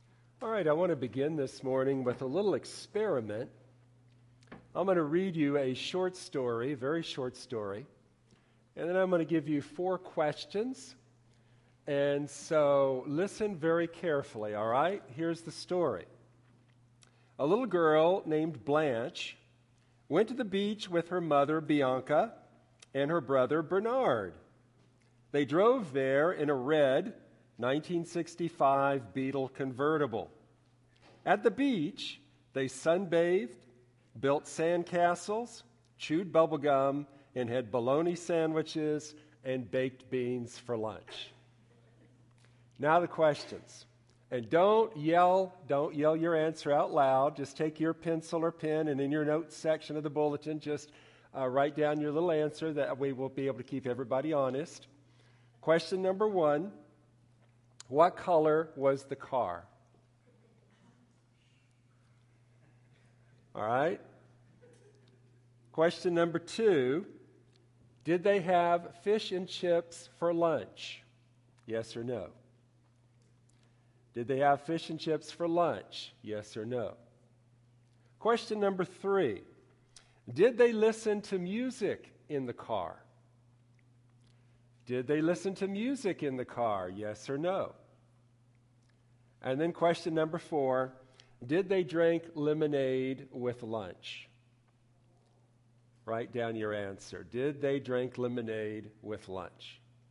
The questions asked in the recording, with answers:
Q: what color was the car?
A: Red.

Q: did they have fish and chips for lunch?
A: No, they had bologna sandwiches and baked beans.